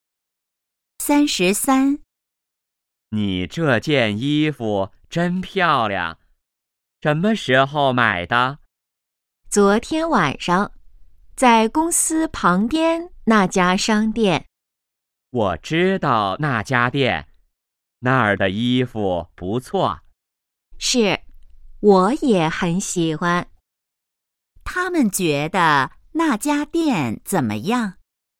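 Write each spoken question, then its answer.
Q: 他们觉得那家店怎么样?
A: 很好,衣服不错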